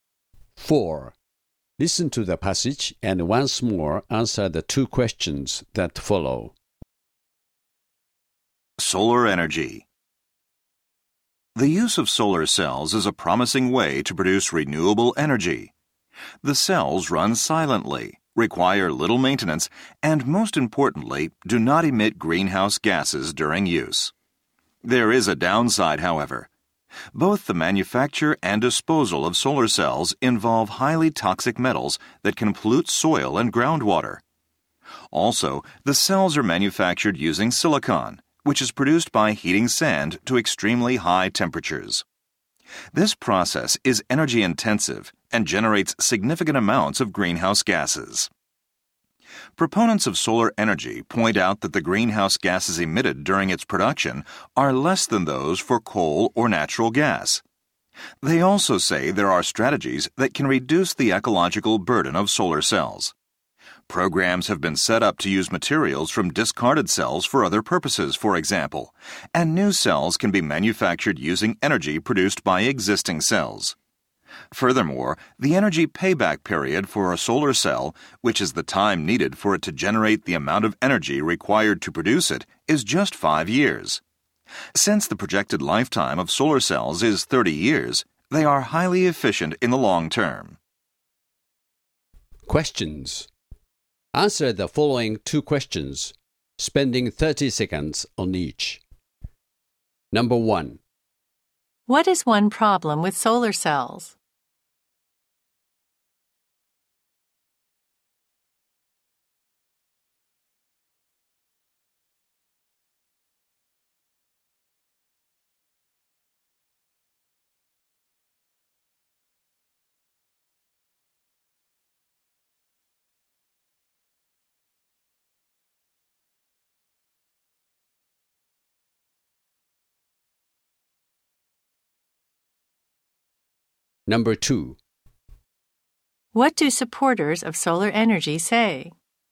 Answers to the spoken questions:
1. The manufacture of solar cells requires the use of highly toxic metals that could pose a serious threat to the environment.
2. Supporters say that strategies can be found to offset such environmental risks, such as recycling materials from spent cells.